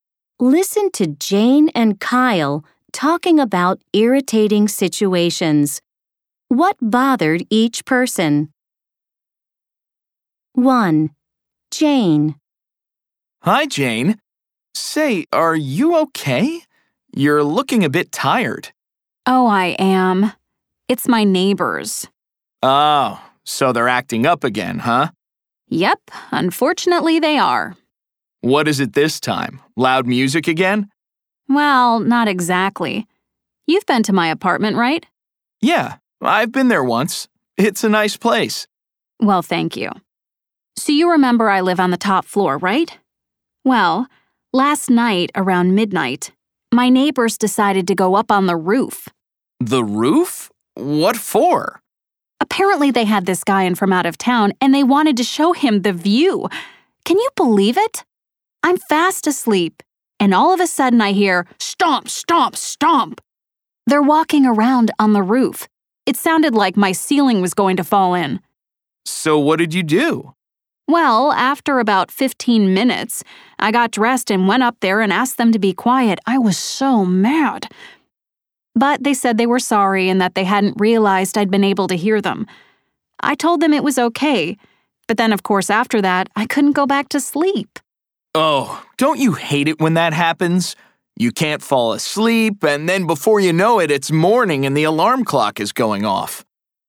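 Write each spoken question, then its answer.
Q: What bothered each person? 1. Jane.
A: Her neighbors walked around on the roof at midnight and woke her up.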